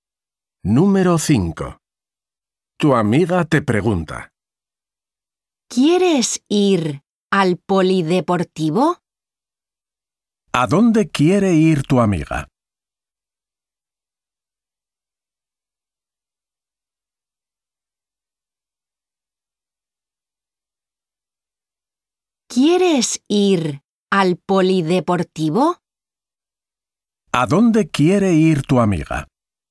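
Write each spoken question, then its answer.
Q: ¿A dónde quiere ir tu amiga?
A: al polideportivo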